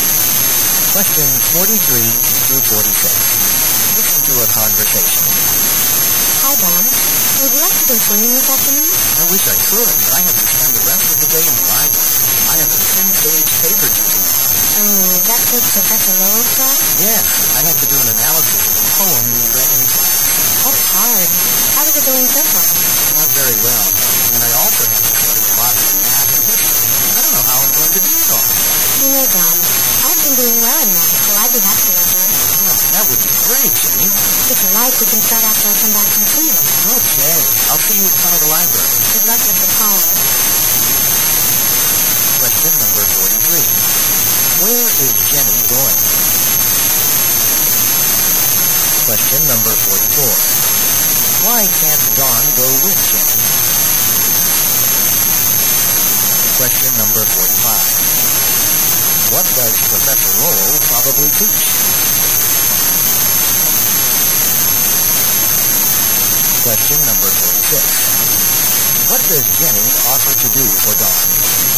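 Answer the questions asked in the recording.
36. Help him with math
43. Swimming
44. He has to write a paper in the library
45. Literature (poetry)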